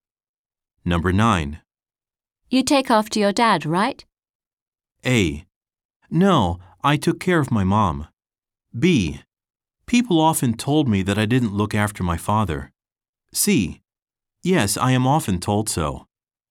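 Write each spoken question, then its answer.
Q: You take after your dad, right?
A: C: Yes, I am often told so.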